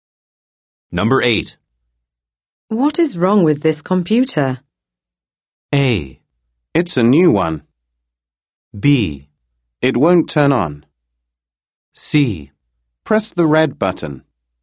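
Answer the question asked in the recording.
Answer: B: It won't turn on.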